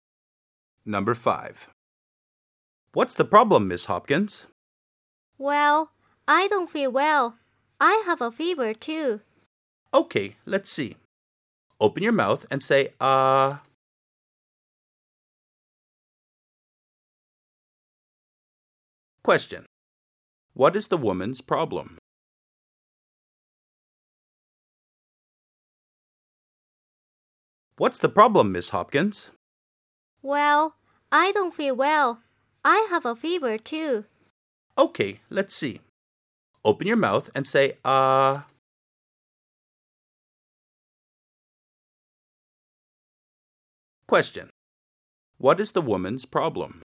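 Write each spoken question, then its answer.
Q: What is the woman's problem?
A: She doesn't feel well and has a fever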